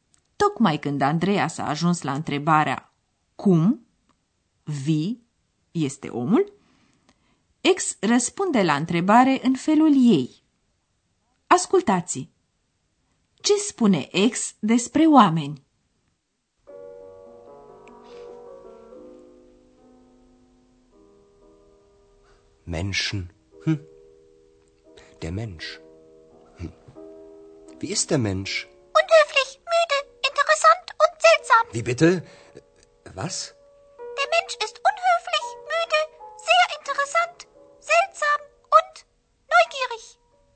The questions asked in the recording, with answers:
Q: Ce spune Ex despre oameni?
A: Așadar, ex știe cum sunt oamenii, sau mai bine zis, crede că știe, și anume curioși, neugierig.